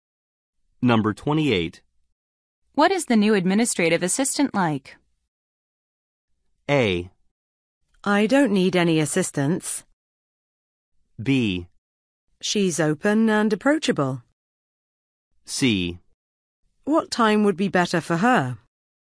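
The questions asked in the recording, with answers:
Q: What is the new administrative assistant like?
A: B: She's open and approachable.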